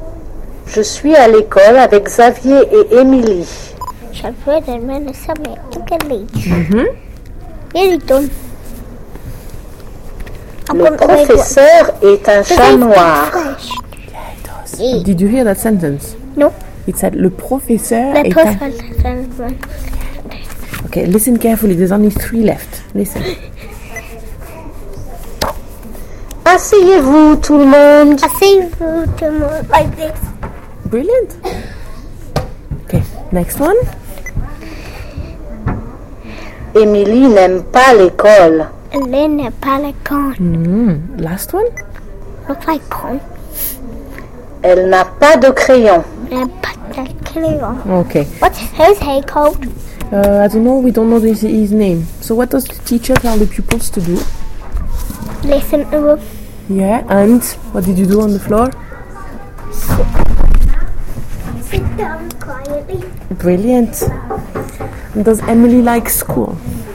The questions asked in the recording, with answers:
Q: And does Emily like school?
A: No. Well done.